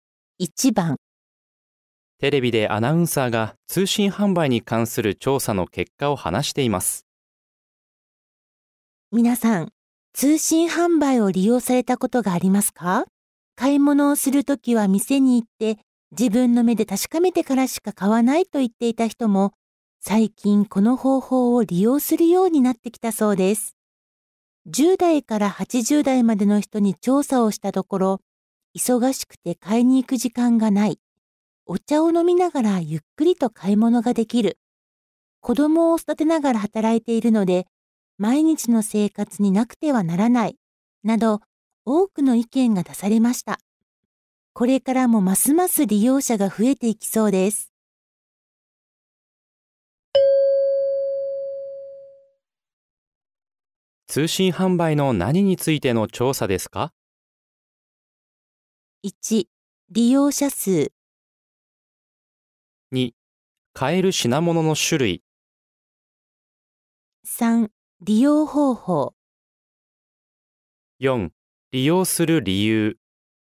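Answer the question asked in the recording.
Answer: 4: 利用する理由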